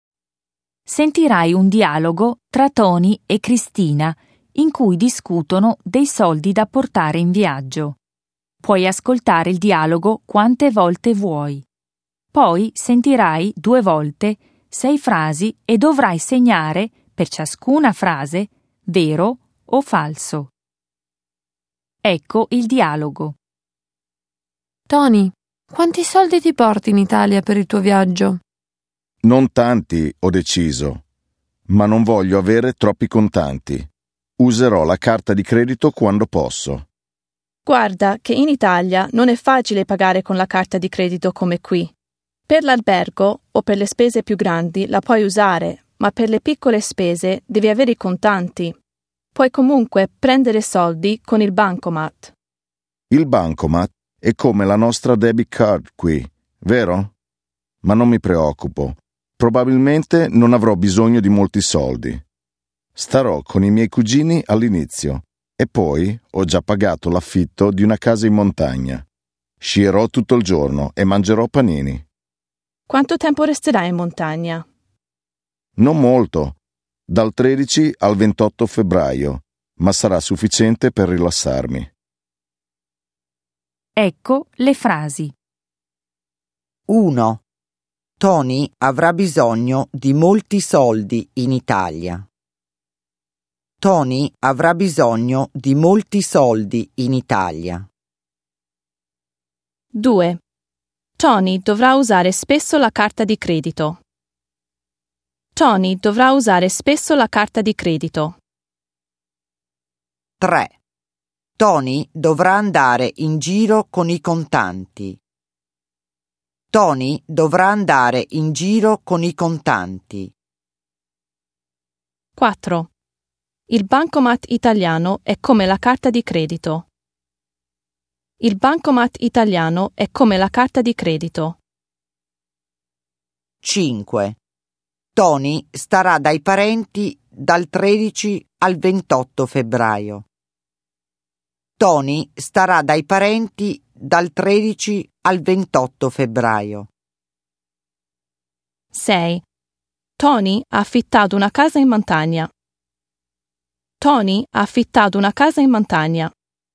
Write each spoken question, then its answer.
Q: Tony avrà bisogno di molti soldi in Italia.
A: 1. Falso.

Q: Tony dovrà usare spesso la carta di credito.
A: 2. Falso.

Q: Tony dovrà andare in giro con i contanti.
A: 3. Vero.

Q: Il bancomat italiano è come la carta di credito.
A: 4. Falso.

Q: Tony starà dai parenti dal 13 al 28 febbraio.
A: 5. Falso.

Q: Tony ha affittato una casa in montagna.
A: 6. Vero.